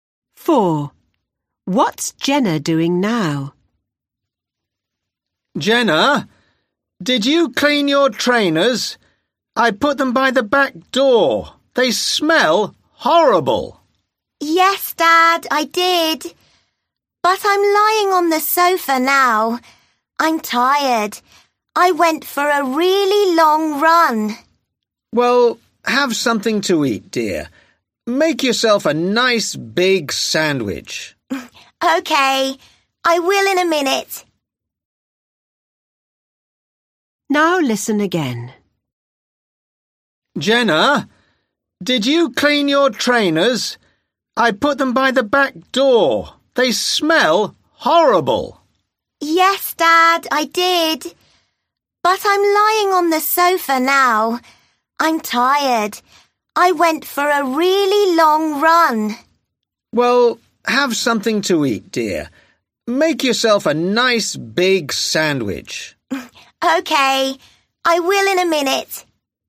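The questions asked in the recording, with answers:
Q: What's Jenna doing now?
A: Lying on the sofa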